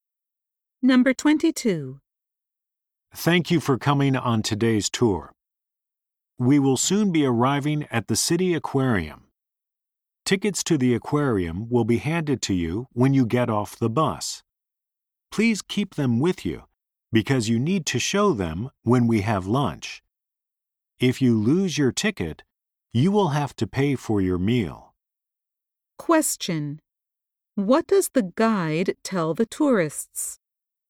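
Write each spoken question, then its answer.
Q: What does the guide tell the tourists?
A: Keep their aquarium tickets, because they must show them at lunch.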